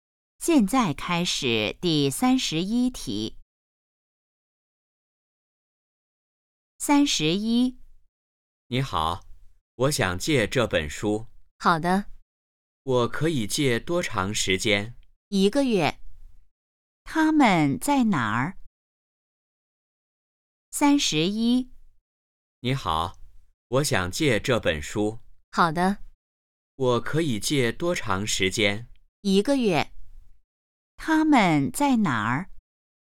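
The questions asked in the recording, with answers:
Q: 他们在哪儿?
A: 图书馆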